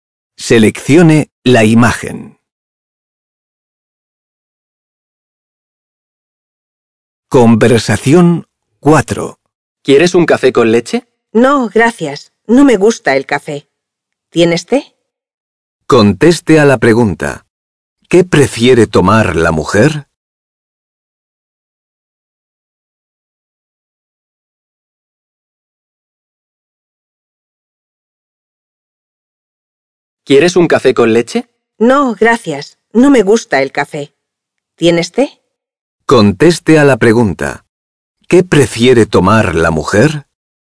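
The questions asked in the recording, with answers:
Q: ¿Qué prefiere tomar la mujer?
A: té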